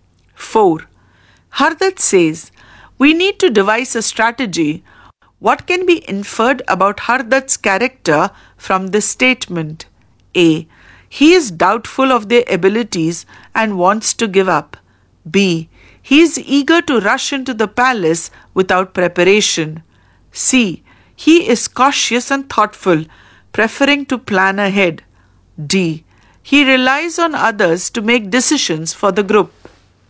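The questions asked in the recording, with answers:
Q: What can be inferred about Hardat's character from this statement?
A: C: He is cautious and thoughtful, preferring to plan ahead.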